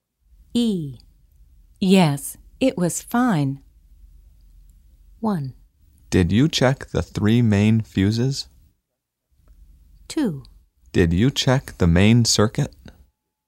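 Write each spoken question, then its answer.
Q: Yes, it was fine.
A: 2: Did you check the main circuit?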